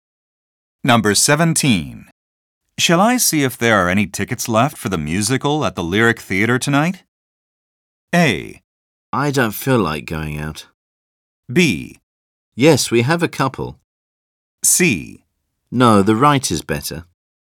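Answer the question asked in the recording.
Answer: A: I don't feel like going out.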